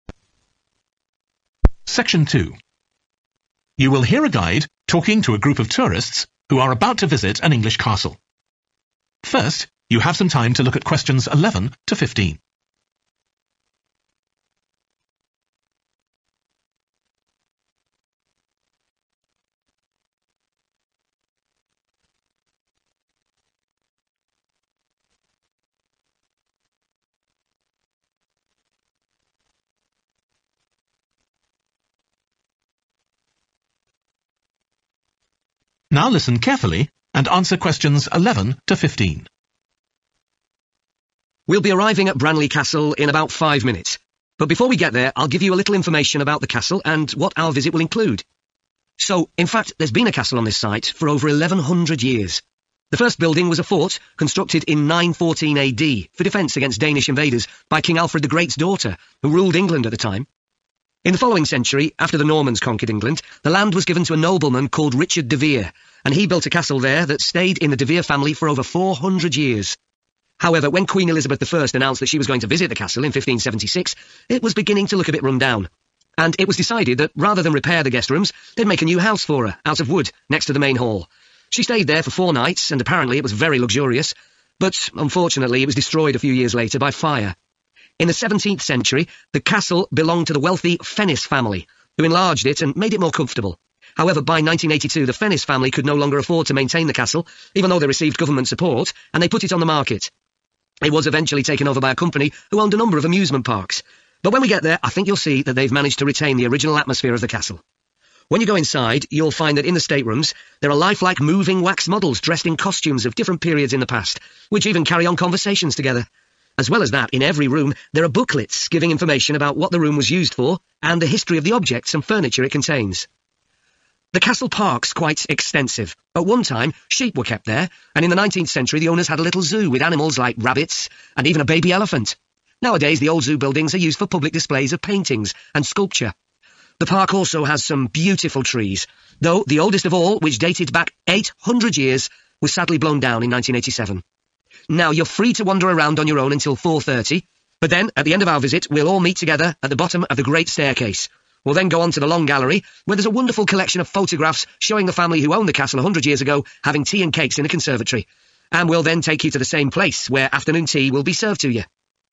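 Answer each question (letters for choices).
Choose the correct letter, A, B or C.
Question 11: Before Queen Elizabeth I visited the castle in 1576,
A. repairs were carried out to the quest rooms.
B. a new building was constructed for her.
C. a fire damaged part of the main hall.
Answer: B

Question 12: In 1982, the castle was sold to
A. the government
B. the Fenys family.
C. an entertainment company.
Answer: C

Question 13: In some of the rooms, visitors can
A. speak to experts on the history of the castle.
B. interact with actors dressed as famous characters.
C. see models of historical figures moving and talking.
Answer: C

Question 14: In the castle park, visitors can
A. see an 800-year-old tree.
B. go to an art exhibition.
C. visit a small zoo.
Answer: B

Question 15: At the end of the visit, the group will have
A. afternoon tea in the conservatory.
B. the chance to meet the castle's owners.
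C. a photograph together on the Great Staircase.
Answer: A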